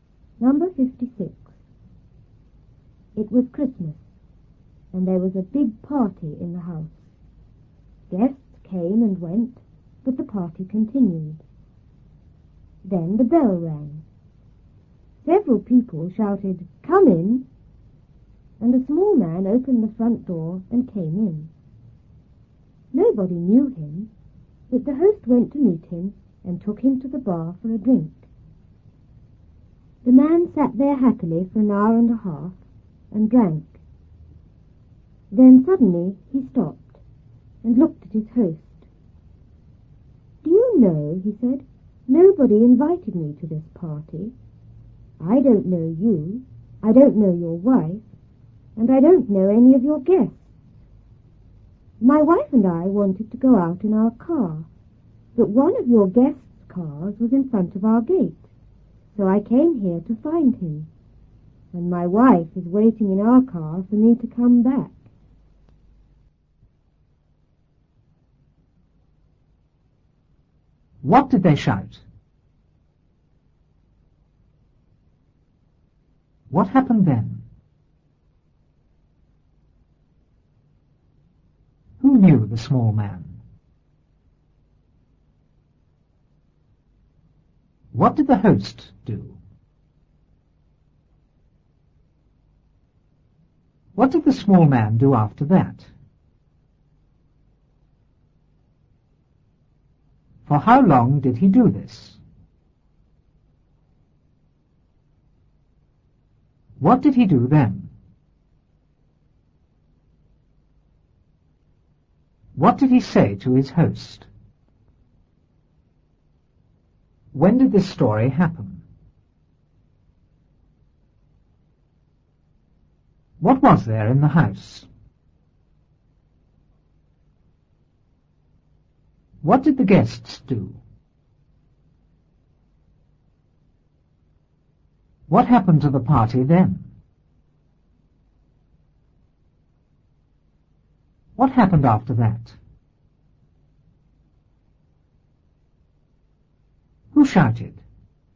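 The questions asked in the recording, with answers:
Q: What did they shout?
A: Come in!

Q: What happened then?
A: A small man opened the front door and came in.

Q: Who knew the small man?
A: Nobody

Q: What did the host do?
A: He went to meet him and took him to the bar for a drink.

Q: What did the small man do after that?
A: He sat there happily and drank.

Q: For how long did he do this?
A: An hour and a half

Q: What did he do then?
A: He suddenly stopped and looked at his host.

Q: What did he say to his host?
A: Nobody invited him; a guest's car was in front of his gate, so he came to find him.

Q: When did this story happen?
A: At Christmas

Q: What was there in the house?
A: A big party

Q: What did the guests do?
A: They came and went.

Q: What happened to the party then?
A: It continued.

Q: What happened after that?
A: The bell rang.

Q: Who shouted?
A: Several people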